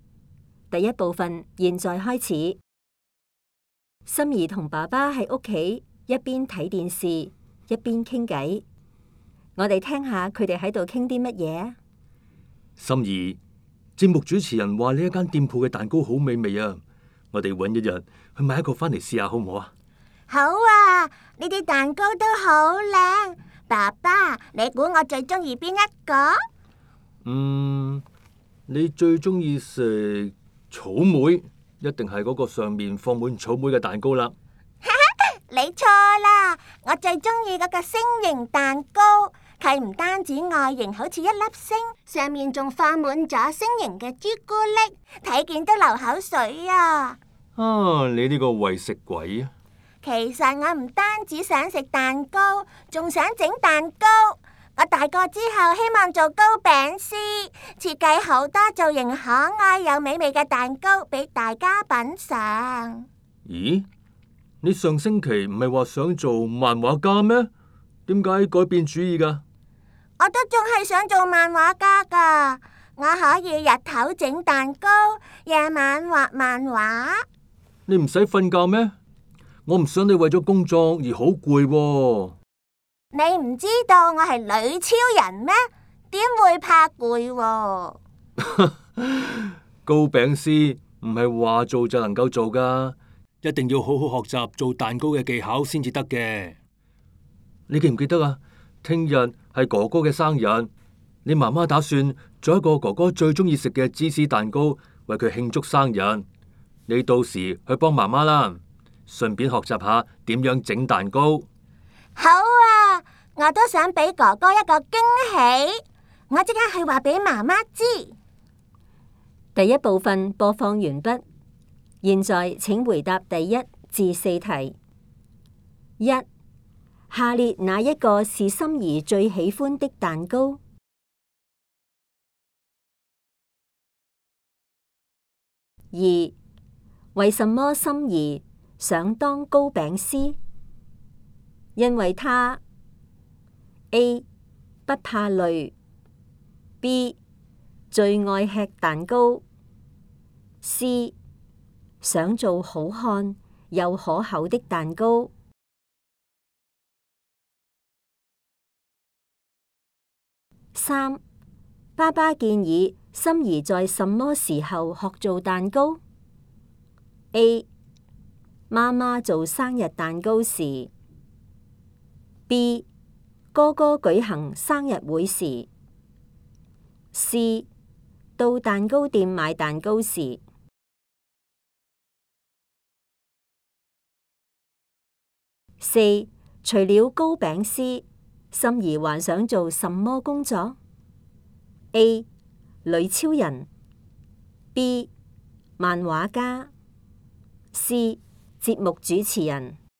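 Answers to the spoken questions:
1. C: 想做好看又可口的蛋糕
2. A: 妈妈做生日蛋糕时
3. B: 漫画家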